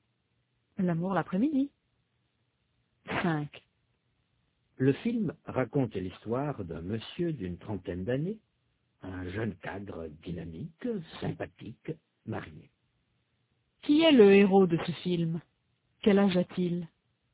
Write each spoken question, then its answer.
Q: Qui est le héros de ce film?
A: C'est un monsieur d'une trentaine d'années, un jeune cadre dynamique, sympathique, marié.

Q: Quel âge a-t-il?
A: C'est un monsieur d'une trentaine d'années